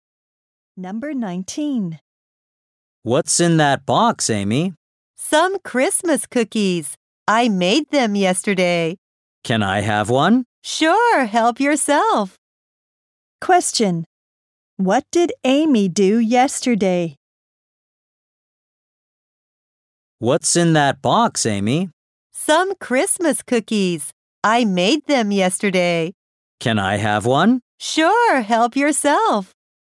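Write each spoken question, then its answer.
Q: Question. What did Amy do yesterday?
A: She made Christmas cookies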